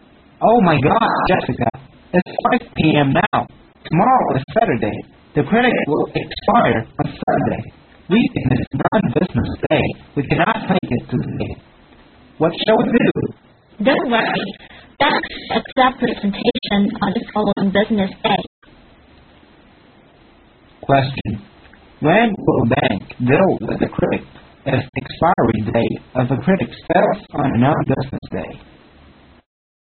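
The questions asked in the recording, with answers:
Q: When will a bank deal with the credit if the expiry date of the credit fails on a non-business day?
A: On the following business day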